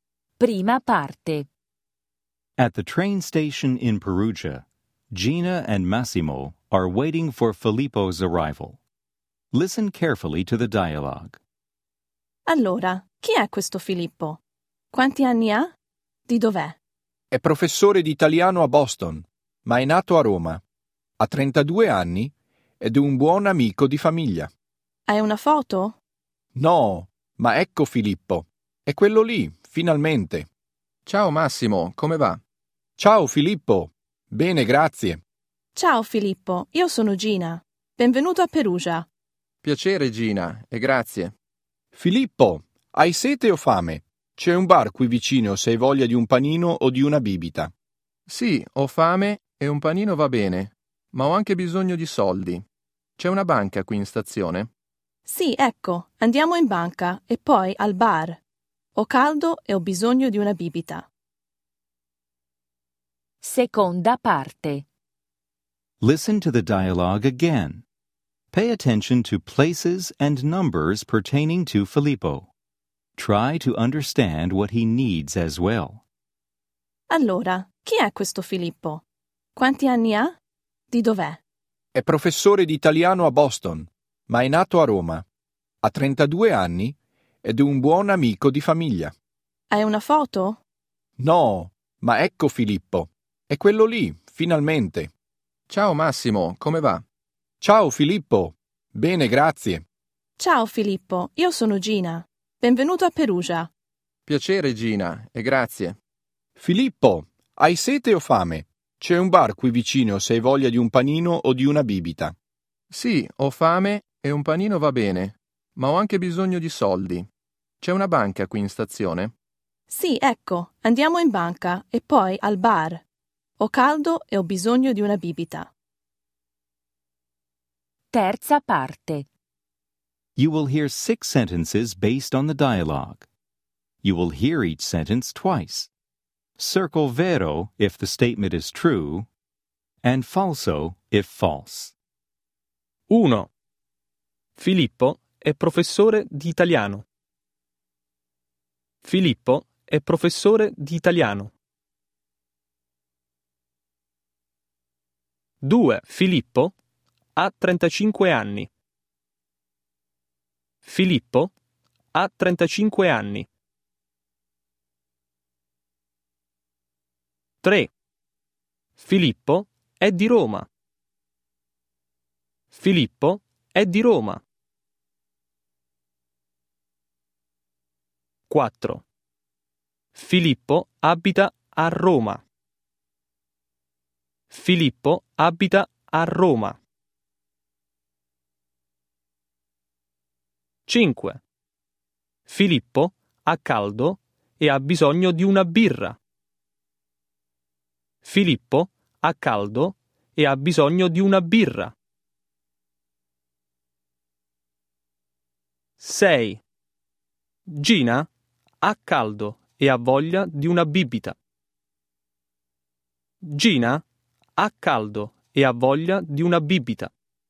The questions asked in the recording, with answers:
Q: Filippo è professore di italiano.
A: Vero

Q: Filippo ha 35 anni.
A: Falso

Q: Filippo è di Roma.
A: Vero

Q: Filippo abita a Roma.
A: Falso

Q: Filippo ha caldo e ha bisogno di una birra.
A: Falso